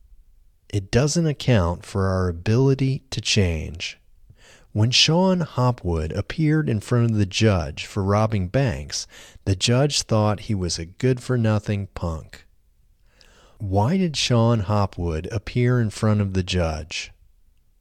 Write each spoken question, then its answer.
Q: Why did Sean Hopwood appear in front of the judge?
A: Sean Hopwood appeared in front of the judge for robbing banks.